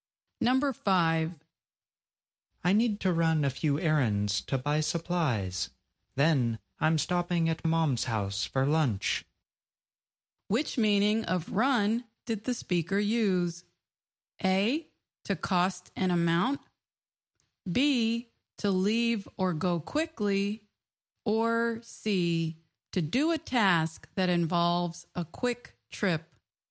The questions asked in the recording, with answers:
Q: Which meaning of run did the speaker use?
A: The answer is C, to do a task that involves a quick trip.